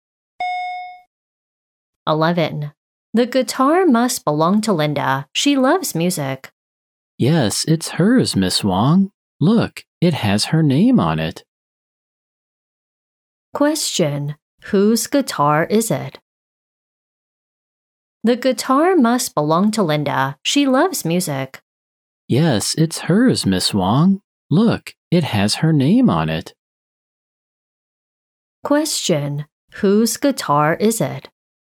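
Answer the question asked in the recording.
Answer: Linda's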